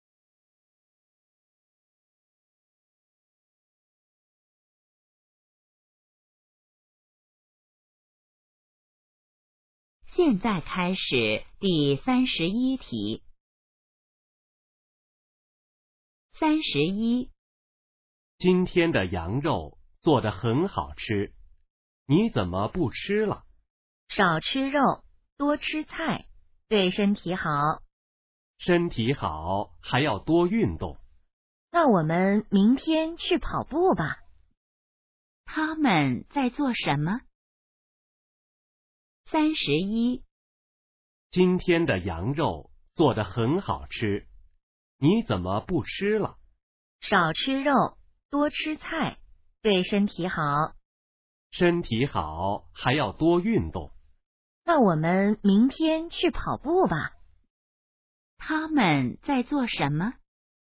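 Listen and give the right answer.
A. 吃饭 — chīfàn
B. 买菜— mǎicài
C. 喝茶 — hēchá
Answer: A. 吃饭 — chīfàn

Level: HSK2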